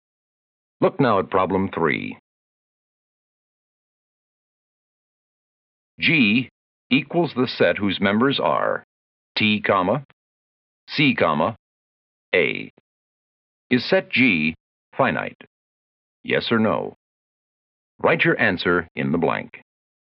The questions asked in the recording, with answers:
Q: Is set G finite? Yes or no?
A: I hope you wrote yes, because set G is made up of just 3 letters.